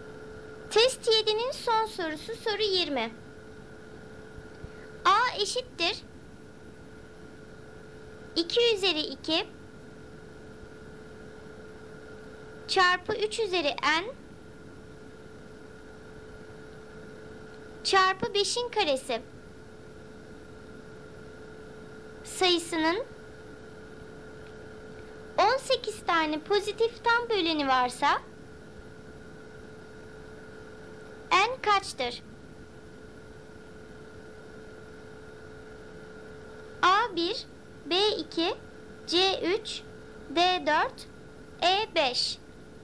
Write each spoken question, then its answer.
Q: n kaçtır?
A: Doğru cevap A 1.